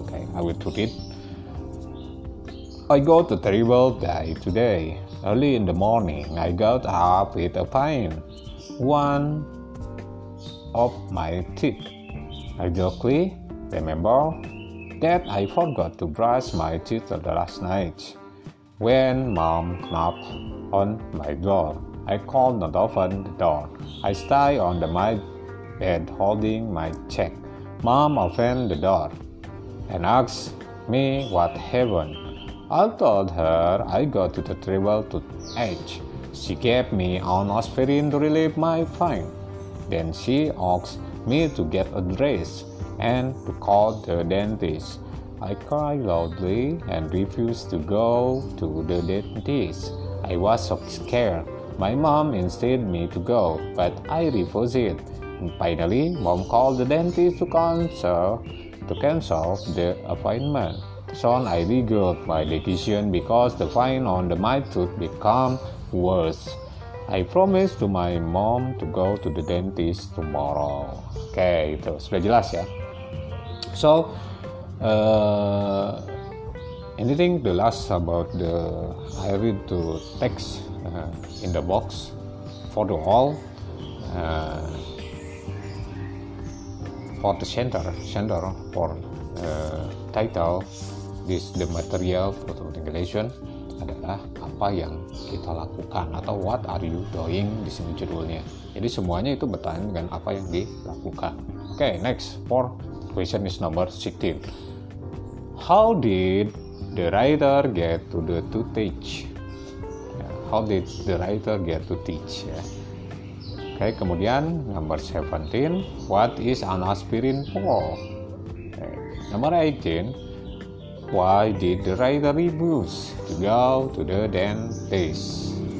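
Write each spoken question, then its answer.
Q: How did the writer get to teach?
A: He forgot to brush his teeth the night before

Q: What is an aspirin for?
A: to relieve the pain

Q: Why did the writer refuse to go to the dentist?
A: He was scared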